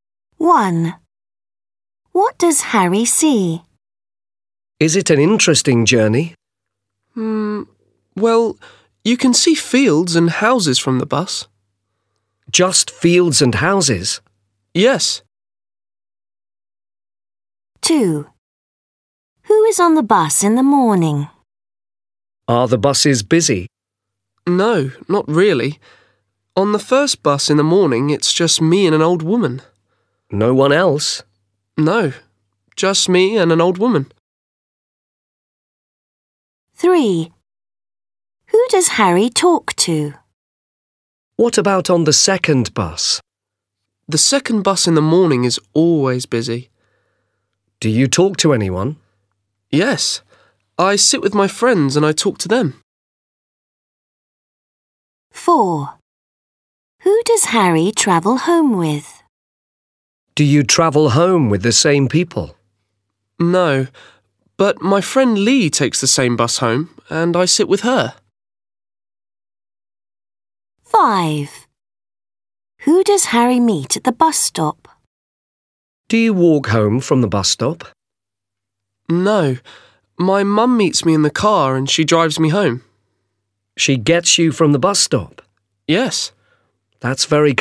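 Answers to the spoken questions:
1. Fields and houses
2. Harry and an old woman
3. His friends
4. His friend Lee
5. His mum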